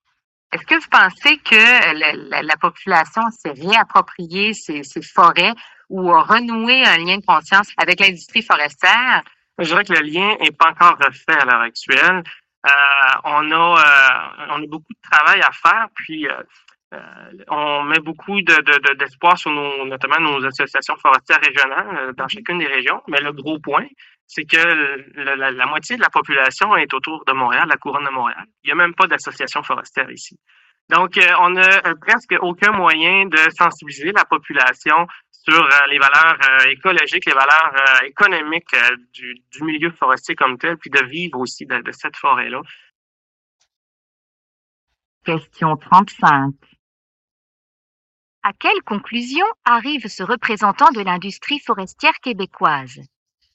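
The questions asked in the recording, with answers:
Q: À quelle conclusion arrive ce représentant de l'industrie forestière québécoise?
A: Le lien avec la population n'est pas encore refait, et il manque de moyens pour la sensibiliser, surtout autour de Montréal.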